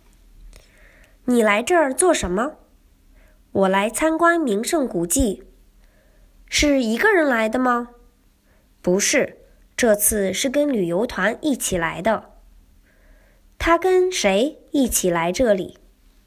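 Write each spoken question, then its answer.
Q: 他跟谁一起来这里?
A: 跟旅游团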